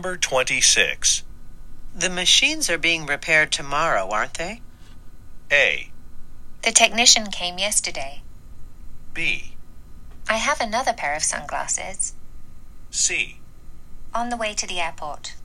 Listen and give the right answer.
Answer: あ、修理の方、昨日来られましたよ。っていうね、これが今日の正答となります。